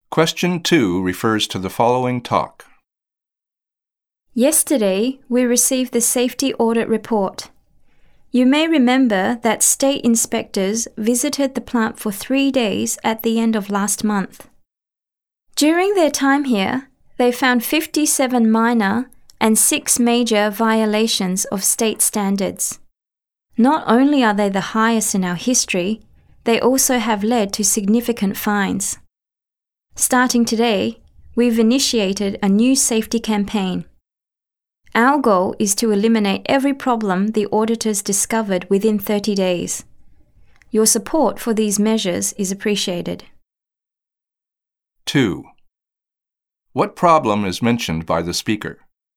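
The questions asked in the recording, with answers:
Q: What problem is mentioned by the speaker?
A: The plant failed a safety audit, with a record number of violations that led to significant fines.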